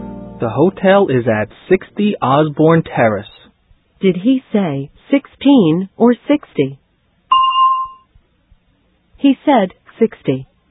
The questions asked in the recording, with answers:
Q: Did he say 16 or 60?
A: He said 60.